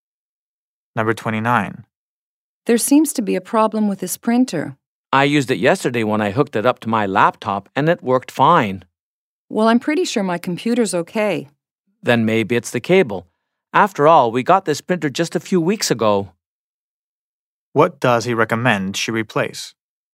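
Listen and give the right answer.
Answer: The cable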